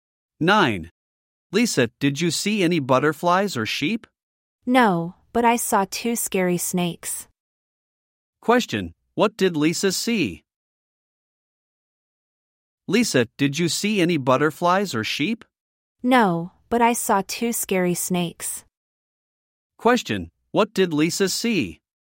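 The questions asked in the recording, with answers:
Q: Question, what did Lisa see?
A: Two scary snakes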